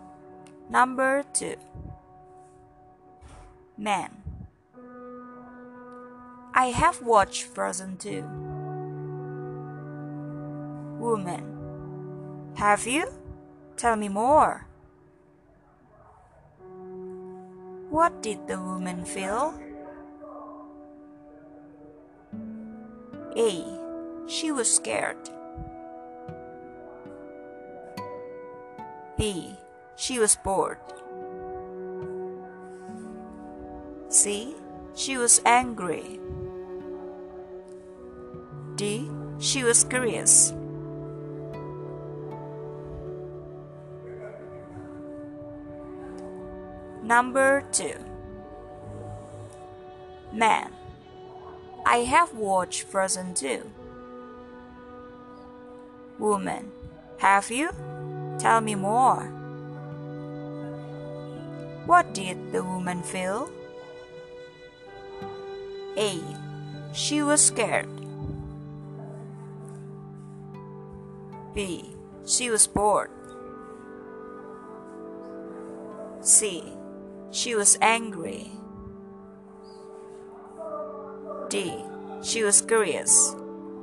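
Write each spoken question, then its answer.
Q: What did the woman feel?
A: D: She was curious.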